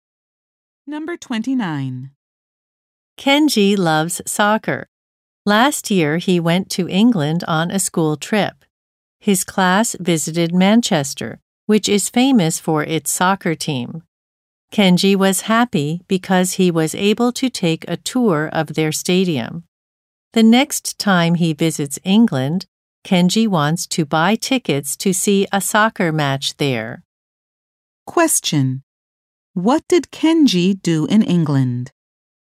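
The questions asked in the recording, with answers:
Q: What did Kenji do in England?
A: He took a tour of a soccer stadium in Manchester.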